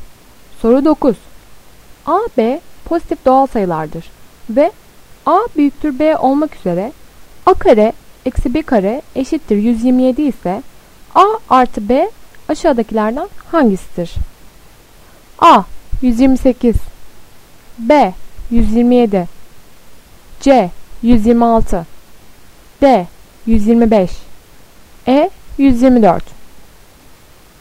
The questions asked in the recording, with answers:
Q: A, B pozitif doğal sayılardır ve A büyüktür B olmak üzere A kare eksi B kare eşittir 127 ise A artı B aşağıdakilerden hangisidir?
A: Doğru cevap B 127.